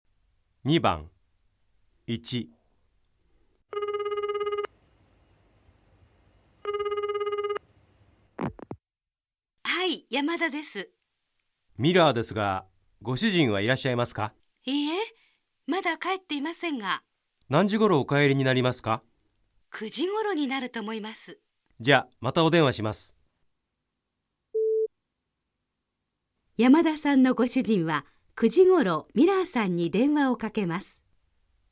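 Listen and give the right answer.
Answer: ×(ミラーさんがまた電話します)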